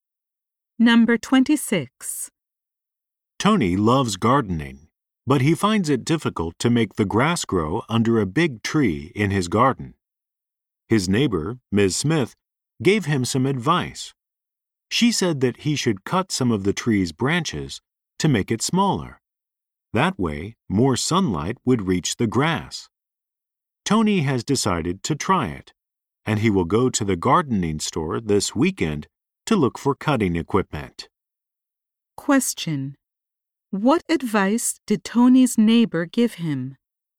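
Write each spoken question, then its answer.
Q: What advice did Tony's neighbor give him?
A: To cut some of the tree's branches to make it smaller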